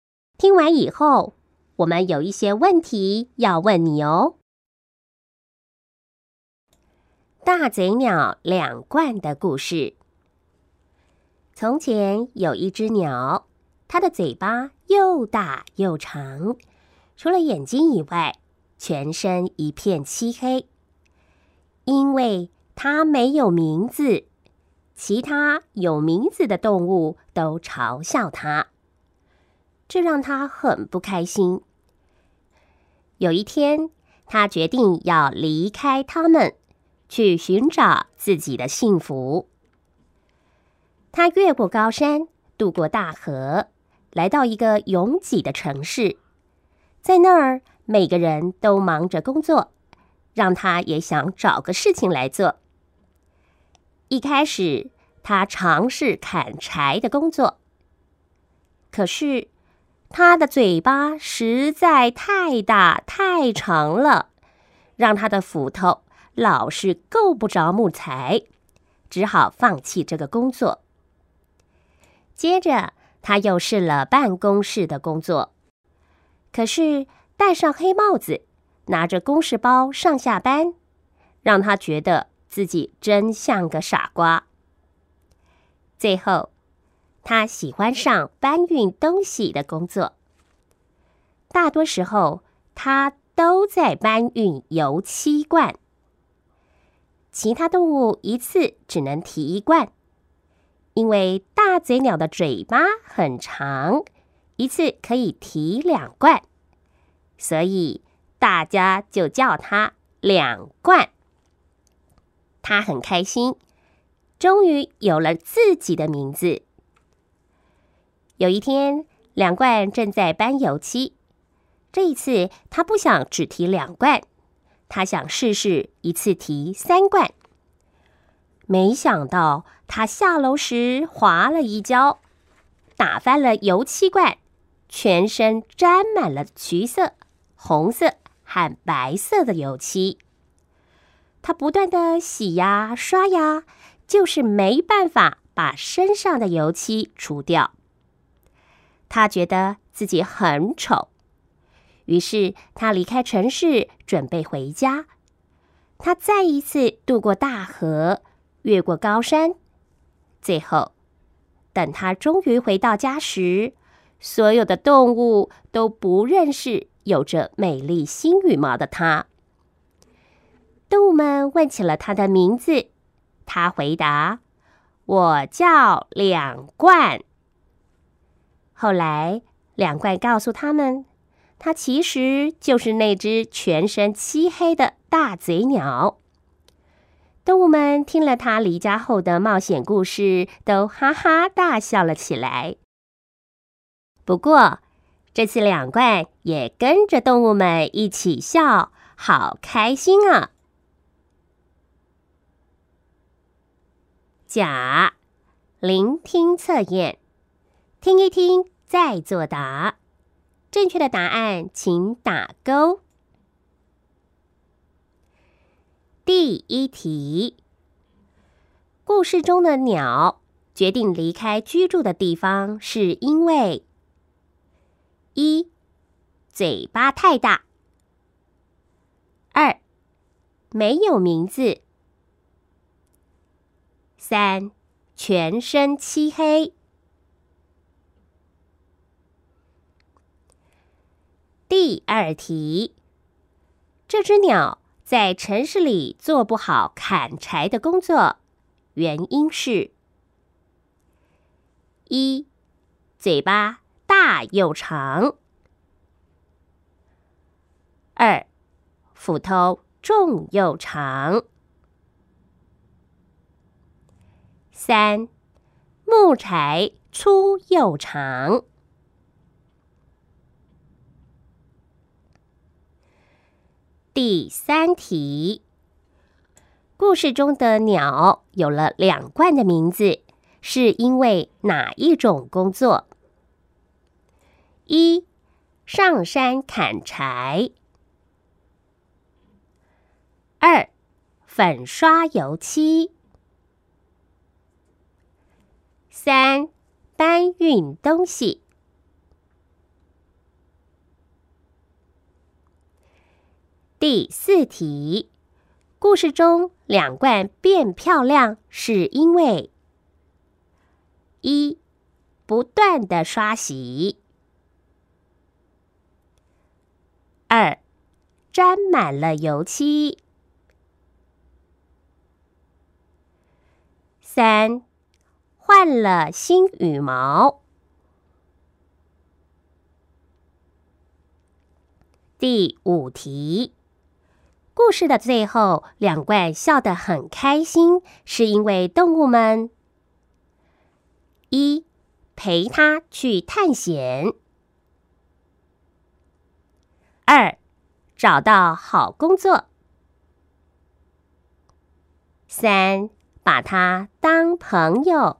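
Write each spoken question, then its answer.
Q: 故事中的鸟决定离开居住的地方是因为一,嘴巴太大;二,没有名字。三,全身漆黑。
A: 二: 没有名字

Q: 这只鸟在城市里做不好砍柴的工作,原因是:一,嘴巴大又长;二,斧头重又长;三,木柴粗又长。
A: 一: 嘴巴大又长

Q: 故事中的鸟有了两冠的名字,是因为哪一种工作?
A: 三: 搬运东西

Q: 故事中两冠变漂亮是因为:一,不断的刷洗;二,沾满了油漆;三,换了新羽毛。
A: 二: 沾满了油漆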